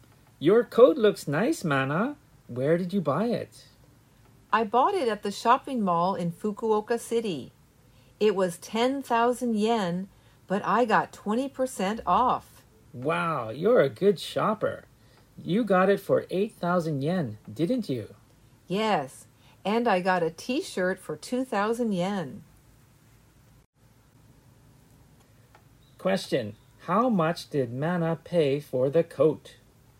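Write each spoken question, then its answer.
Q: how much did Mana pay for the coat?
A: 8,000 yen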